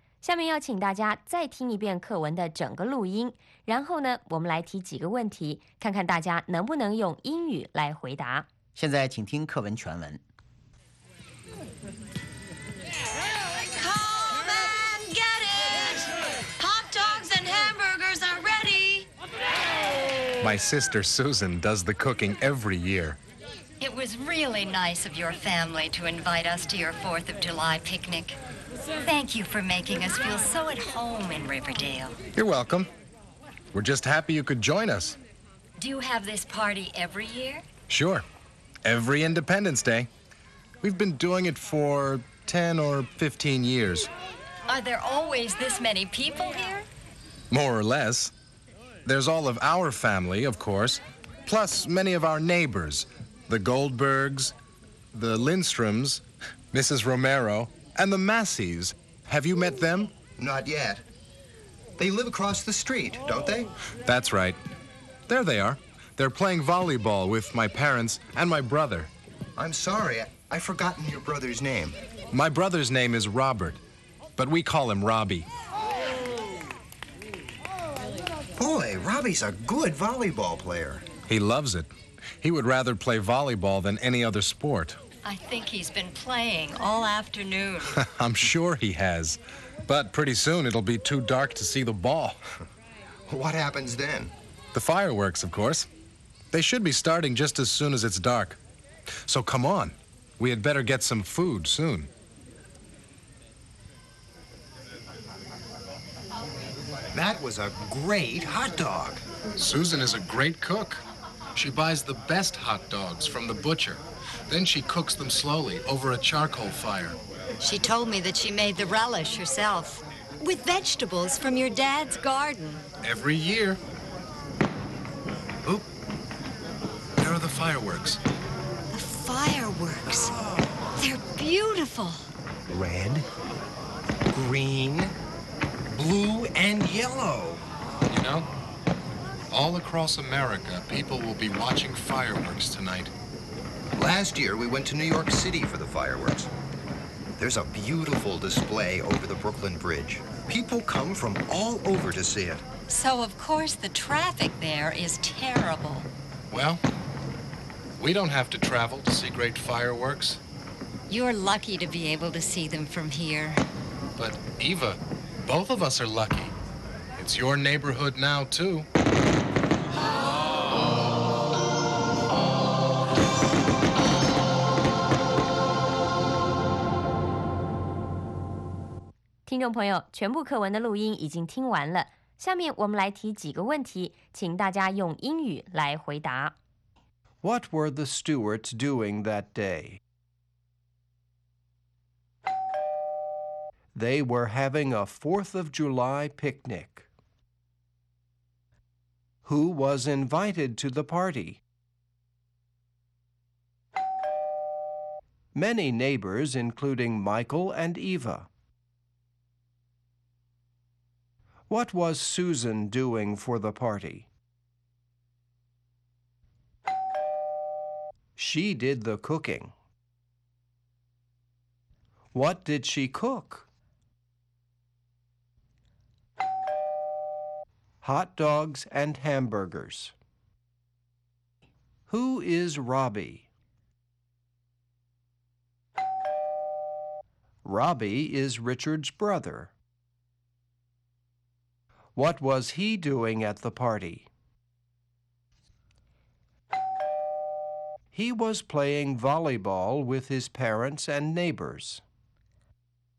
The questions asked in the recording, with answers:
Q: What were the Stewarts doing that day?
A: They were having a 4th of July picnic.

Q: Who was invited to the party?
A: Many neighbors, including Michael and Eva.

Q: What was Susan doing for the party?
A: She did the cooking.

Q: What did she cook?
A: Hot dogs and hamburgers.

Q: Who is Robbie?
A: Robbie is Richard's brother.